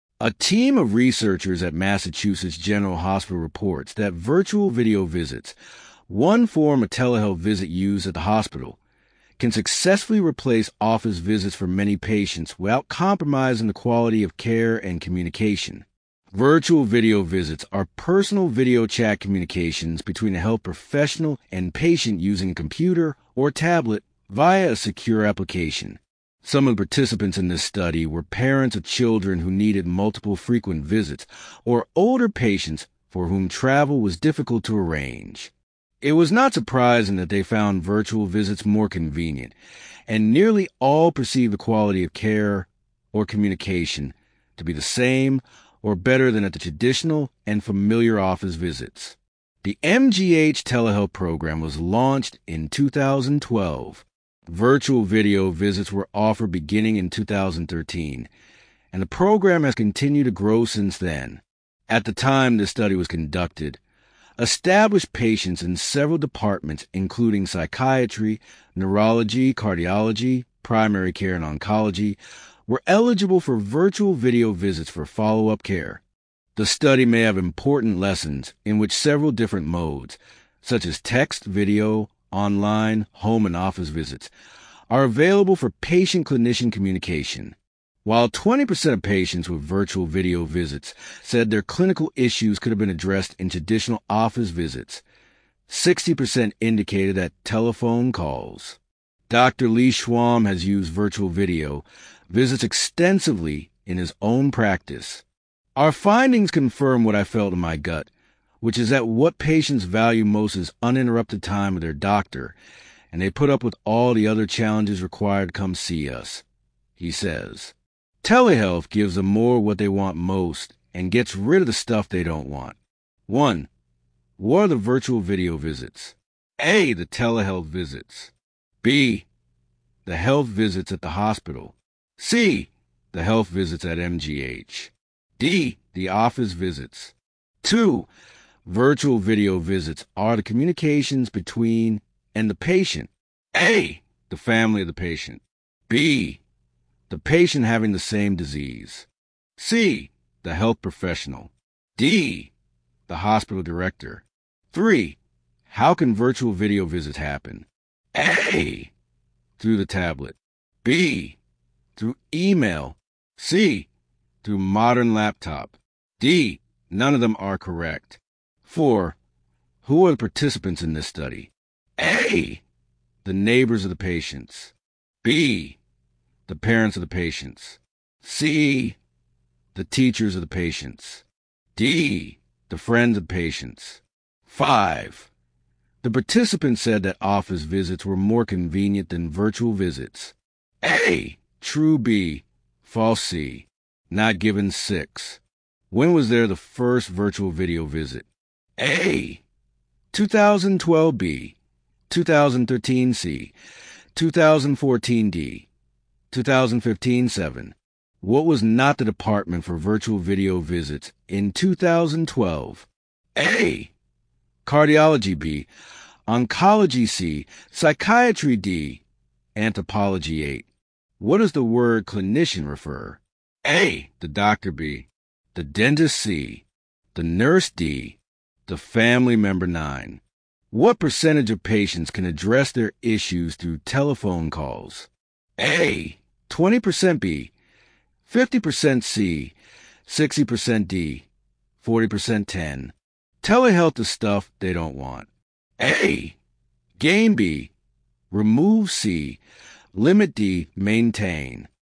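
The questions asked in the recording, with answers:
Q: What are the virtual video visits?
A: A: The telehealth visits.

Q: Virtual video visits are the communications between and the patient.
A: C: The health professional.

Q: How can virtual video visits happen?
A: A: Through the tablet.

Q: Who are the participants in this study?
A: B: The parents of the patients.

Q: The participants said that office visits were more convenient than virtual visits.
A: B: False.

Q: When was there the first virtual video visit?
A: B: 2013.

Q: What was not the department for virtual video visits in 2012?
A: D: Anthropology.

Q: What percentage of patients can address their issues through telephone calls?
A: C: 60%.

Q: Telehealth the stuff they don't want.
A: B: Remove.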